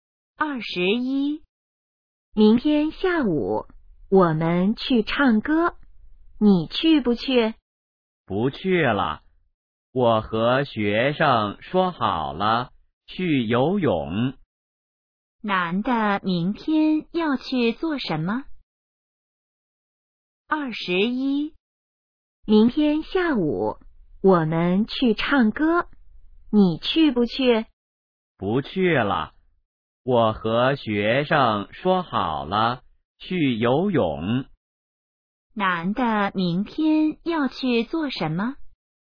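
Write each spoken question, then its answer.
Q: 男的明天要去做什么?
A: 去游泳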